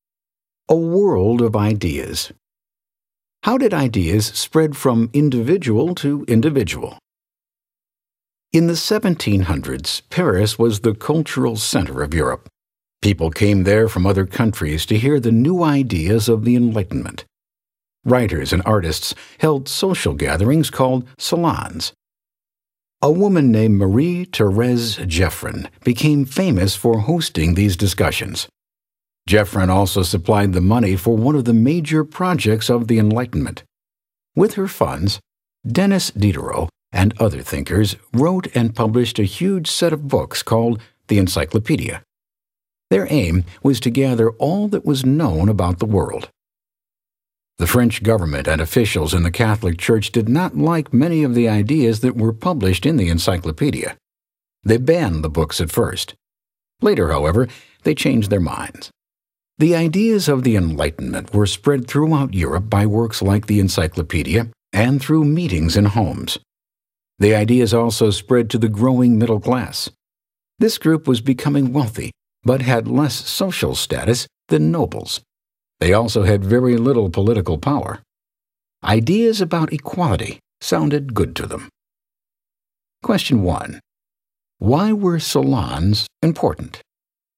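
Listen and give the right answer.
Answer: They spread Enlightenment ideas through discussions among writers, artists and thinkers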